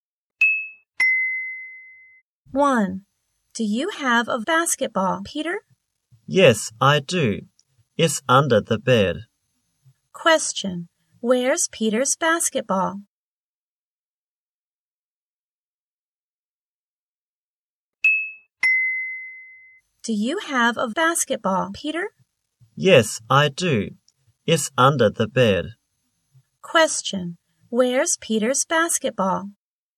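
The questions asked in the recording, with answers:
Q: Where's Peter's basketball?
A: Under the bed.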